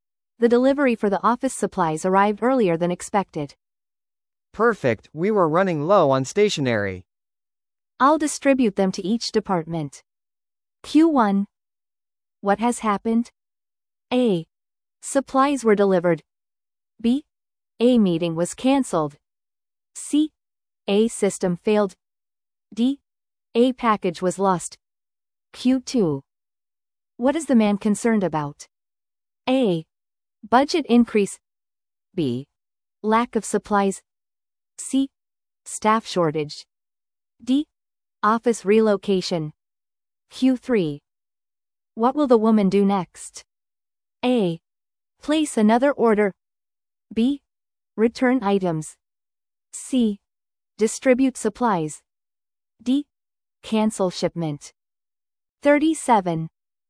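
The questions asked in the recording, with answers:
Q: What has happened?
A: A: Supplies were delivered.

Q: What is the man concerned about?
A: B: Lack of supplies.

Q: What will the woman do next?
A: C: Distribute supplies.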